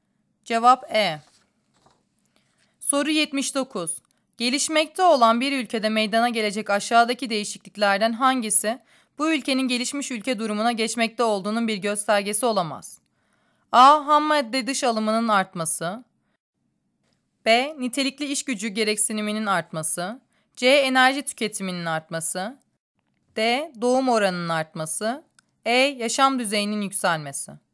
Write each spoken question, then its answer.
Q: Gelişmekte olan bir ülkede meydana gelecek aşağıdaki değişikliklerden hangisi bu ülkenin gelişmiş ülke durumuna geçmekte olduğunun bir göstergesi olamaz?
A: Cevap D.